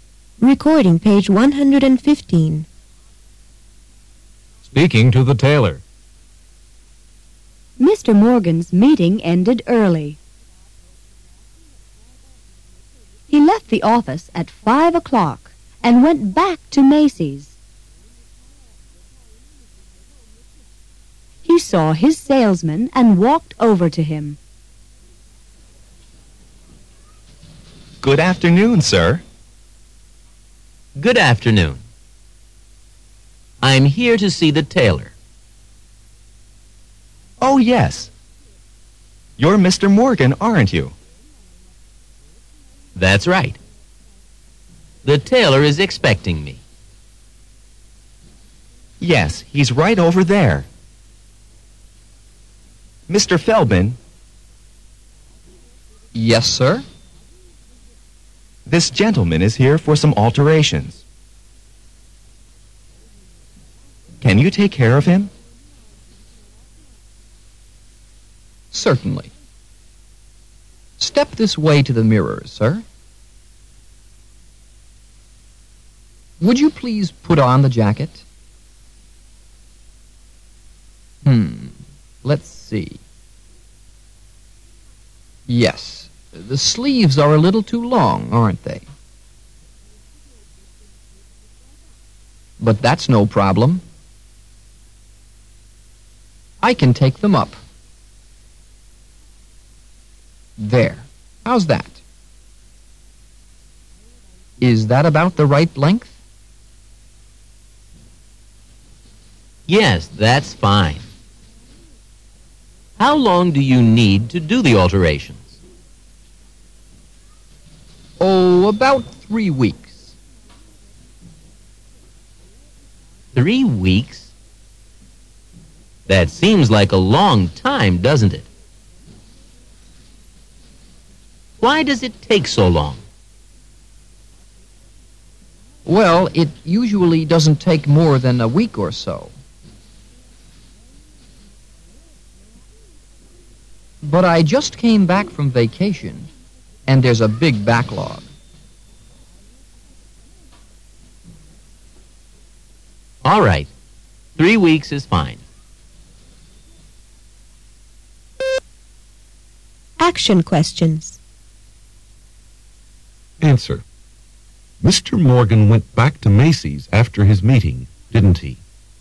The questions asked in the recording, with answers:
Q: Mr. Morgan went back to Macy's after his meeting, didn't he?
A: Yes, he did.